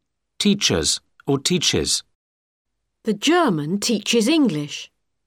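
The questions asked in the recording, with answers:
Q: Teachers or teaches.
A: teaches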